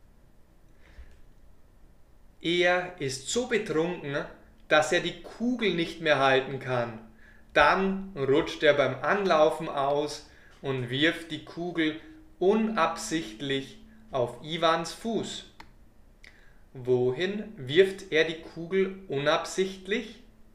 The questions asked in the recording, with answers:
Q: Wohin wirft er die Kugel unabsichtlich?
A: Auf Iwans Fuß.